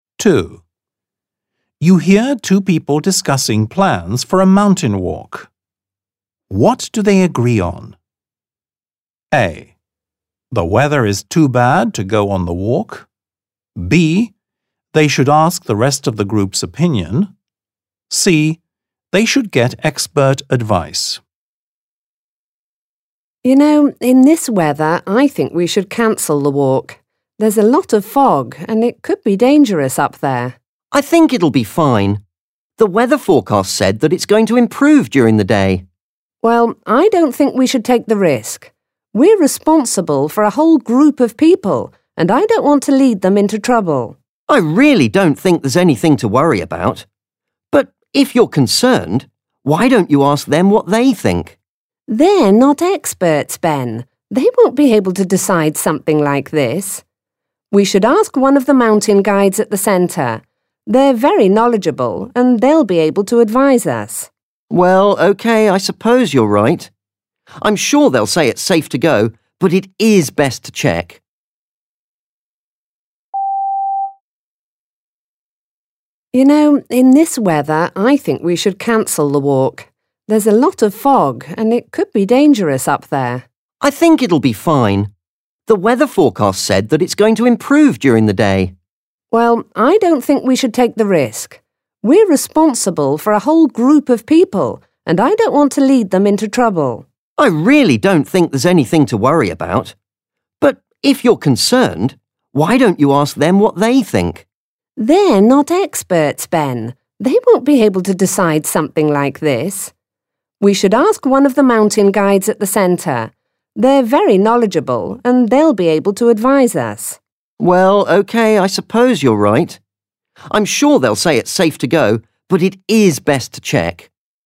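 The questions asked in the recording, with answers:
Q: What do they agree on?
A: C: They should get expert advice.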